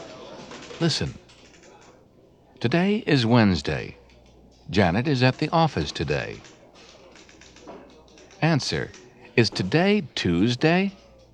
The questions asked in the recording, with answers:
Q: Is today Tuesday?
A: No, it's not.